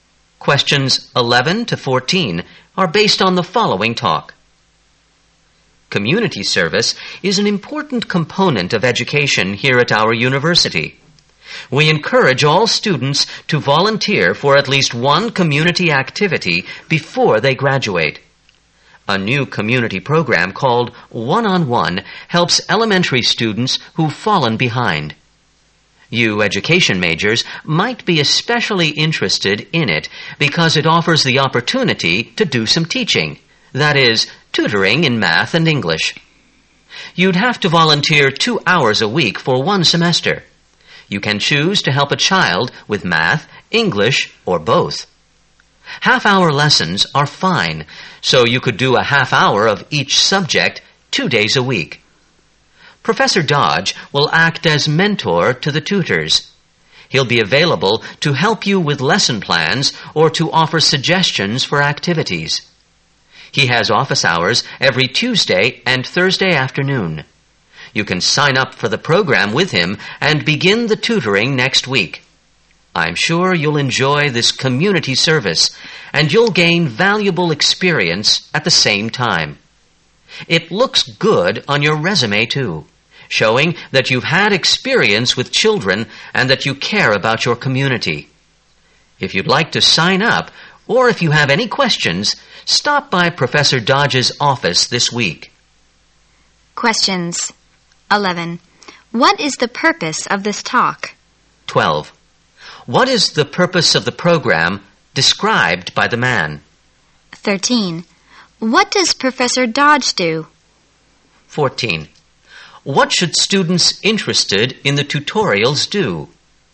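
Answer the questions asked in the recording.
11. To encourage students to volunteer as tutors in the One-on-One program
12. To help elementary students who've fallen behind
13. He acts as mentor to the tutors
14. Stop by Professor Dodge's office this week to sign up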